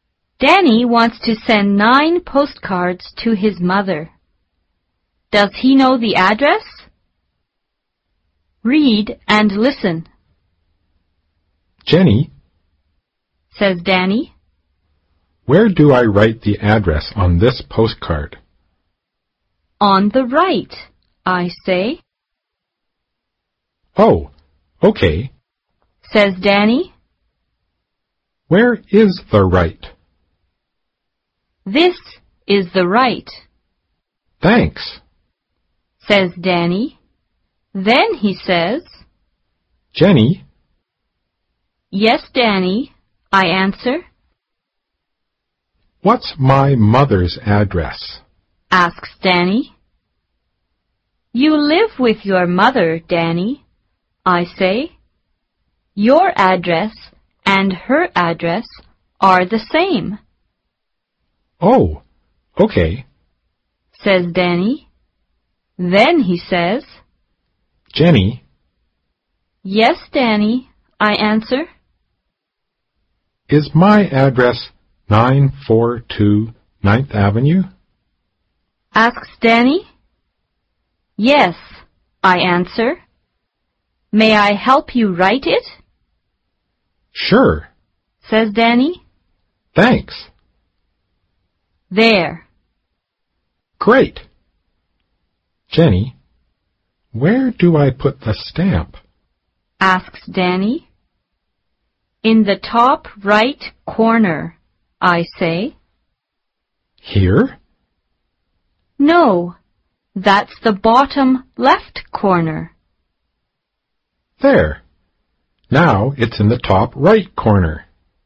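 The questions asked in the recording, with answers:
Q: Does he know the address?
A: No, he doesn't know it (Jenny helps him; it is 942 9th Avenue).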